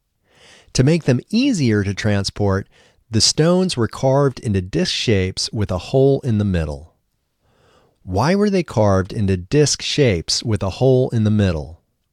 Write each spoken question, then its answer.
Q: Why were they carved into disc shapes with a hole in the middle?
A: They were carved into disc shapes with a hole in the middle to make them easier to transport.